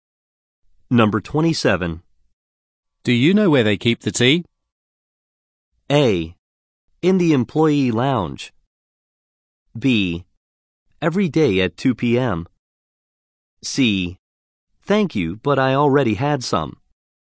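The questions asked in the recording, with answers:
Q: Do you know where they keep the tea?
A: A: In the employee lounge.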